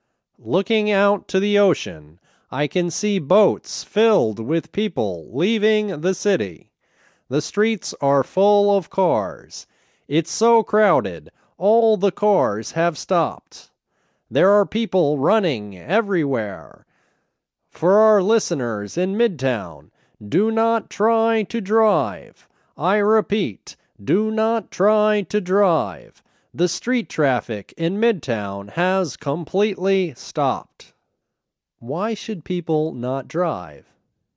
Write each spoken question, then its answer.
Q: Why should people not drive?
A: People shouldn't drive because the street traffic in Midtown has completely stopped.